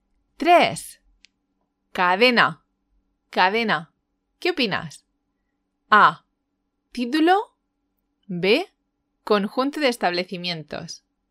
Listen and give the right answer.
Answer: La respuesta correcta es la B.